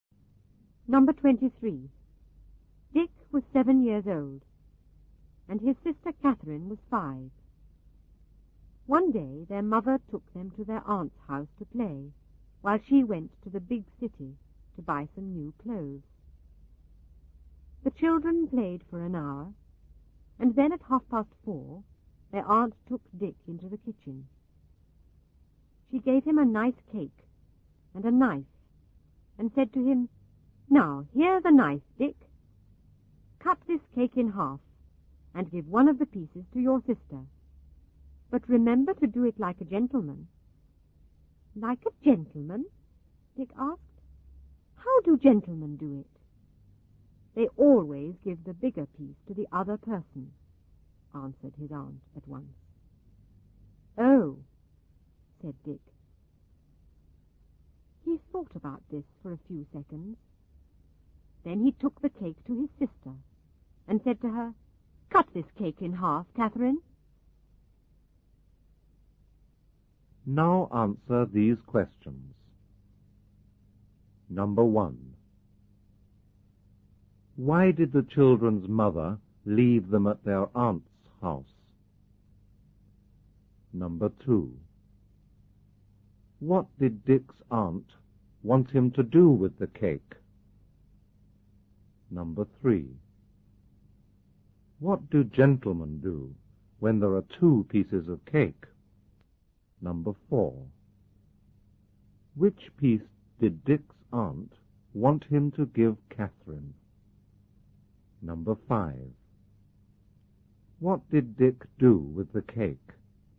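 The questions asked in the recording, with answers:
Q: Why did the children's mother leave them at their aunt's house?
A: She went to the big city to buy new clothes.

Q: What did Dick's aunt want him to do with the cake?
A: Cut it in half and give one piece to his sister.

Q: What do gentlemen do when there are 2 pieces of cake?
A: They give the bigger piece to the other person.

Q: Which piece did Dick's aunt want him to give Catherine?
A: The bigger piece.

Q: What did Dick do with the cake?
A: He gave it to Catherine and asked her to cut it in half.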